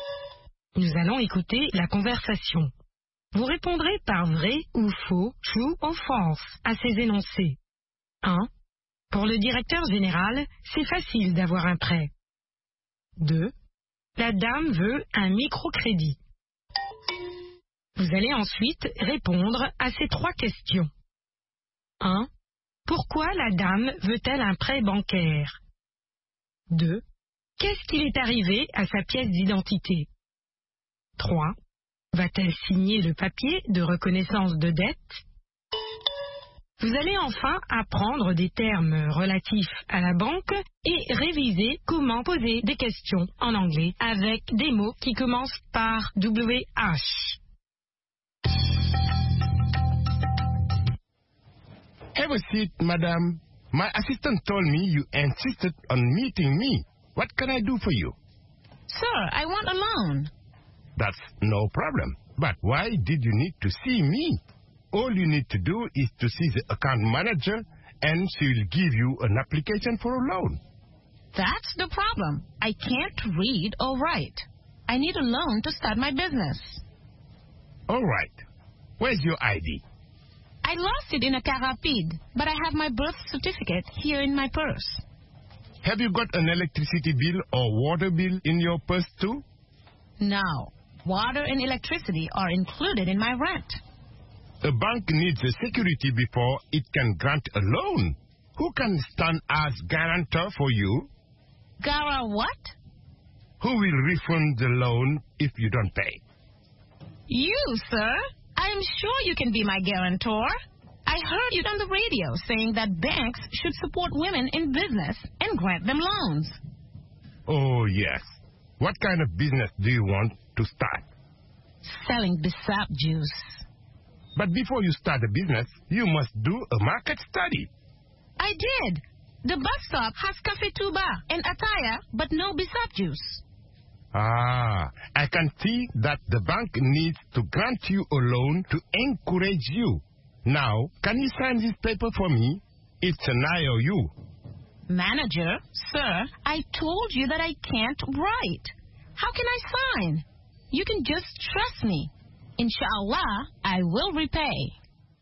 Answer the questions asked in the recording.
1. L'énoncé 1 est vrai.
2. L'énoncé 2 est faux.
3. Pour commencer son propre commerce.
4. Elle l'a perdue.
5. Non.